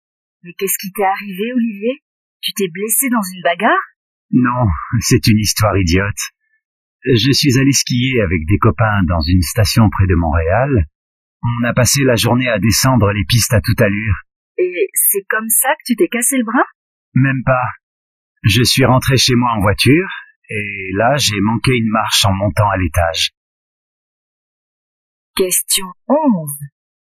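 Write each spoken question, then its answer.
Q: Comment Olivier s'est-il cassé le bras?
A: Il a manqué une marche en montant l'escalier chez lui.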